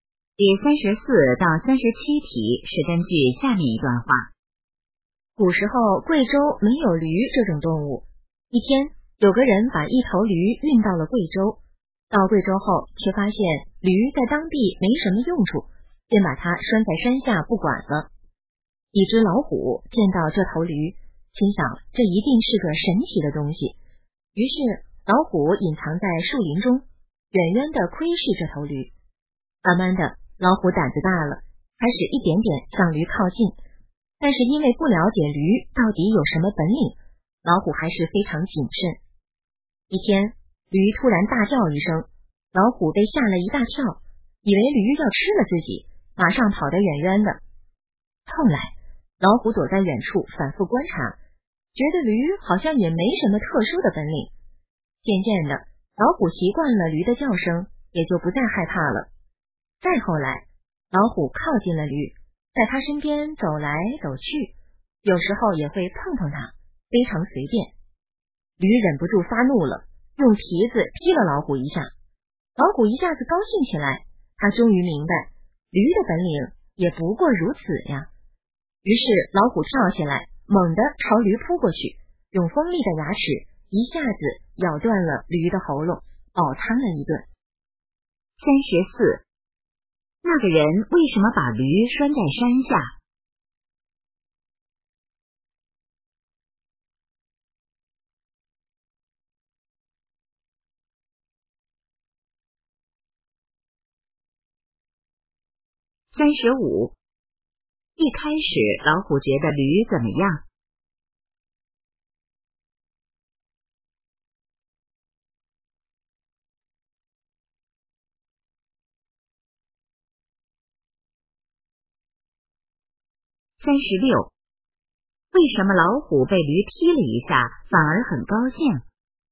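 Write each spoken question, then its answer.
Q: 那个人为什么把驴拴在山下?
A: 驴在当地没什么用处

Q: 一开始老虎觉得驴怎么样?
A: 是个神奇的东西

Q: 为什么老虎被驴踢了一下反而很高兴?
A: 明白了驴的本领不过如此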